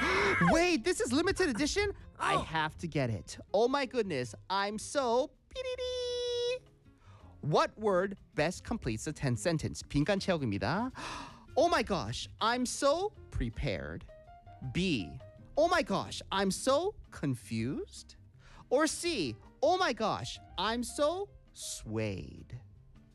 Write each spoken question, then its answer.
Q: What word best completes the 10 sentence?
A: 자, 정답 C.